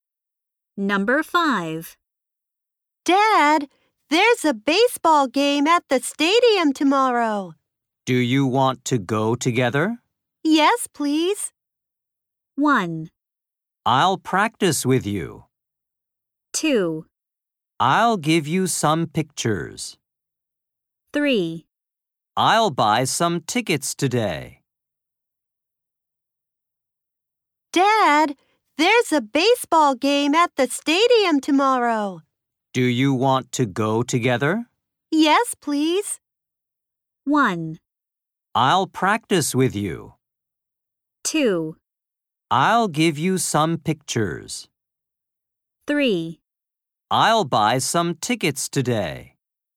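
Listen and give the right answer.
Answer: 3: I'll buy some tickets today.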